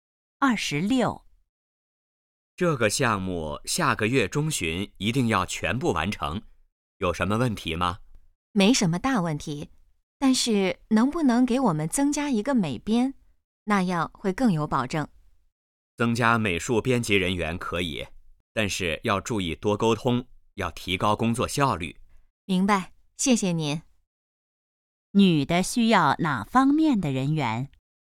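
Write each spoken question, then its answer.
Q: 女的需要哪方面的人员?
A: 美术编辑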